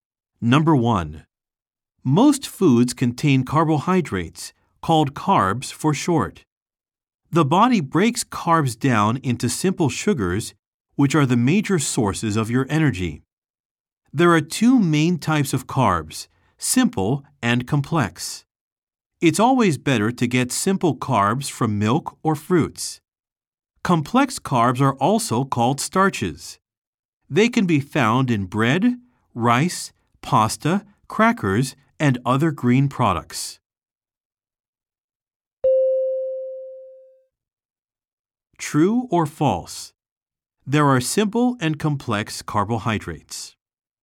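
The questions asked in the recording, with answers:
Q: True or false? There are simple and complex carbohydrates.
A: True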